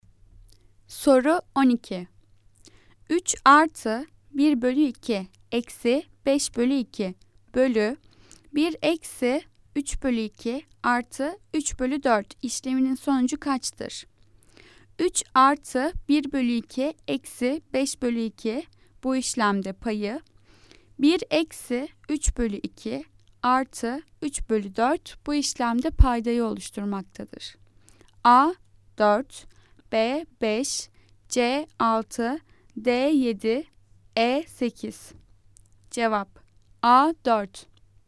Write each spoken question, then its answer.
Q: 3 artı 1 bölü 2 eksi 5 bölü 2 bölü 1 eksi 3 bölü 2 artı 3 bölü 4 işleminin sonucu kaçtır?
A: Cevap A 4.